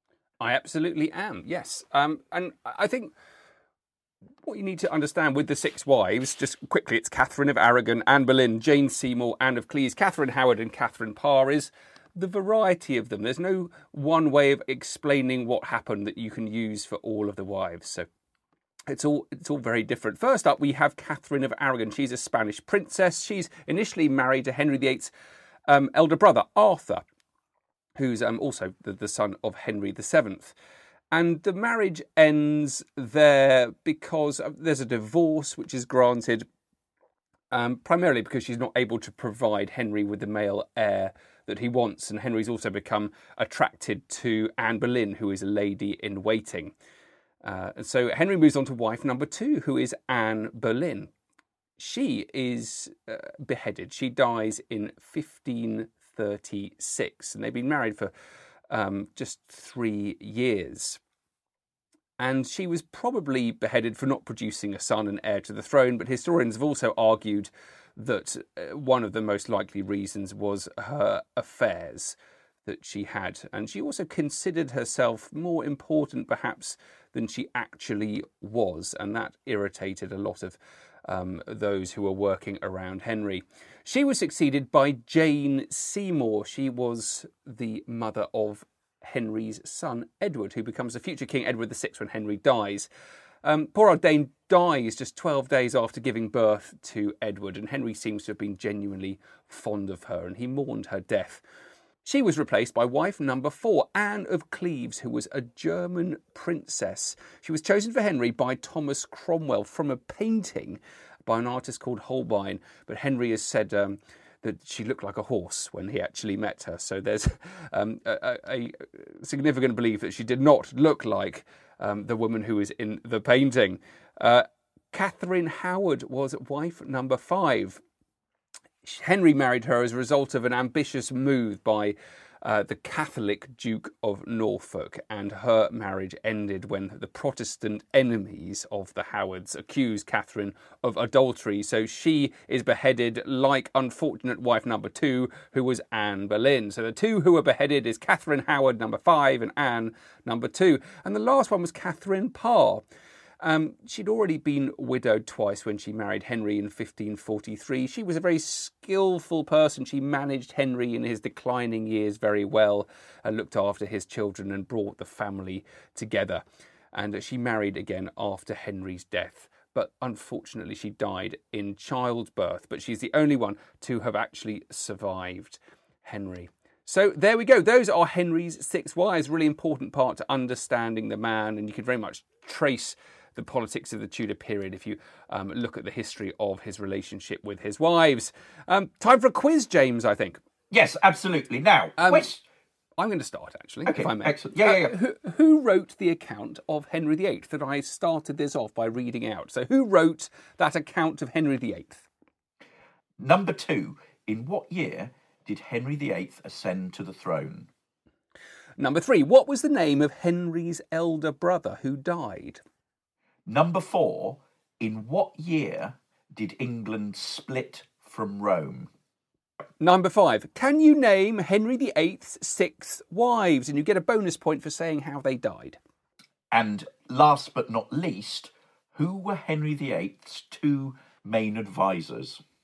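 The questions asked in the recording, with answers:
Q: what was the name of Henry's elder brother who died?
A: Arthur

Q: can you name Henry VIII's 6 wives?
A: Catherine of Aragon, Anne Boleyn, Jane Seymour, Anne of Cleves, Catherine Howard and Catherine Parr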